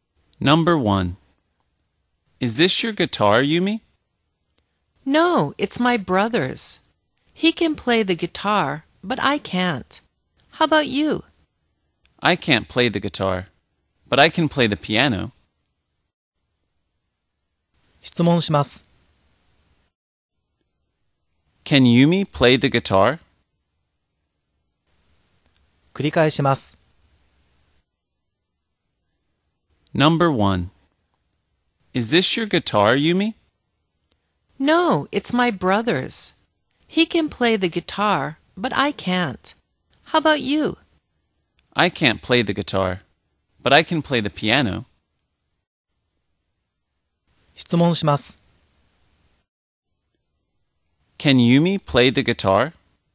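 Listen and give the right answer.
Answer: No, she can't.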